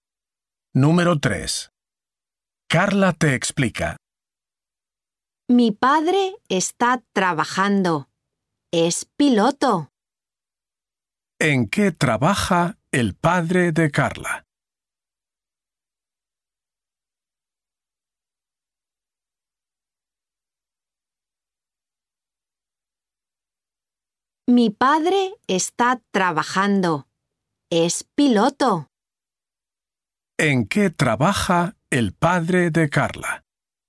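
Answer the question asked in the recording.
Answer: Es piloto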